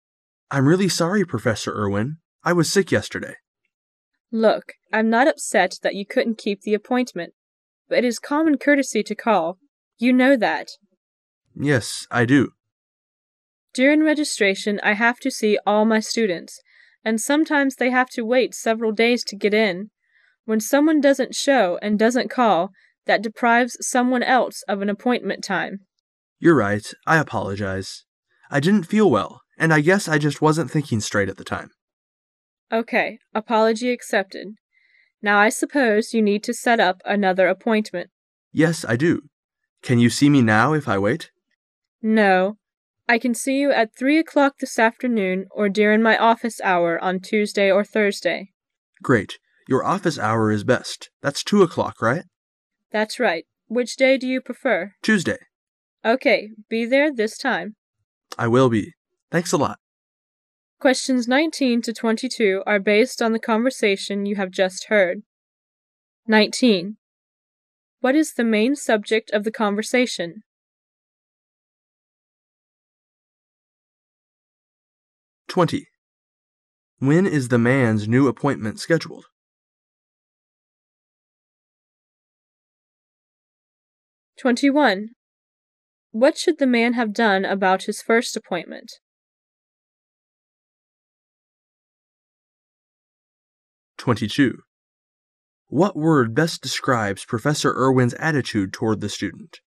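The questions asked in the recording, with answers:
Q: What is the main subject of the conversation?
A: Rescheduling a missed appointment

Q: When is the man's new appointment scheduled?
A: Tuesday at 2 o'clock

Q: What should the man have done about his first appointment?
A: Called to cancel it

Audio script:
[解析] 19-22 M: I'm really sorry, Professor Irwin. I was sick yesterday. W: Look, I'm not upset that you couldn't keep the appointment, but it is common courtesy to call. You know that. M: Yes, I do. W: During registration I have to see all my students, and sometimes they have to wait several days to get in. When someone doesn't show and doesn't call, that deprives someone else of an appointment time. M: You're right. I apologize. I didn't feel well, and I guess I just wasn't thinking straight at the time. W: Okay. Apology accepted. Now, I suppose you need to set up another appointment. 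M: Yes, I do. Can you see me now if I wait? W: No. I can see you at three o' clock this afternoon, or during my office hour on Tuesday or Thursday. M: Great, Your office hour is best. That's two o'clock, right ? W: That's right. Which day do you prefer? M: Tuesday. W: Okay. Be there this time. M: I will be. Thanks a lot.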